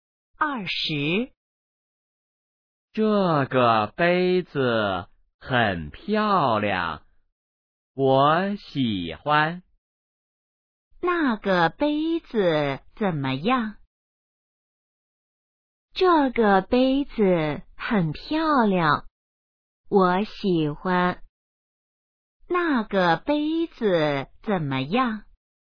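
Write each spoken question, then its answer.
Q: 那个杯子怎么样?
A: 很漂亮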